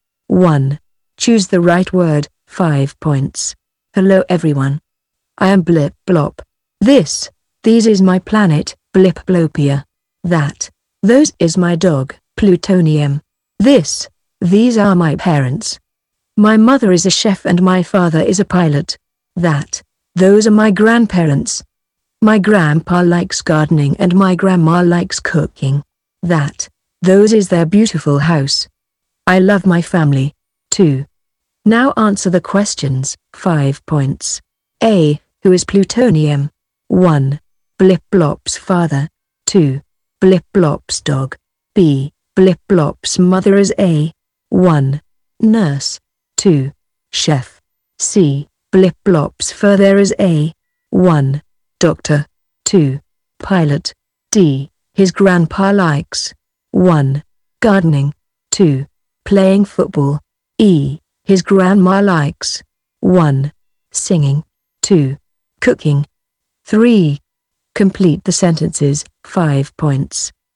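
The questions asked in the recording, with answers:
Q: Who is Plutonium? 1. Blip Blop's father. 2. Blip Blop's dog.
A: 2: Blip Blop's dog

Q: Blip Blop's mother is A. 1. Nurse. 2. Chef.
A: 2: Chef

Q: Blip Blop's father is A. 1. Doctor. 2. Pilot.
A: 2: Pilot

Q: His grandpa likes. 1. Gardening. 2. Playing football.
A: 1: Gardening

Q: His grandma likes. 1. Singing. 2. Cooking.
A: 2: Cooking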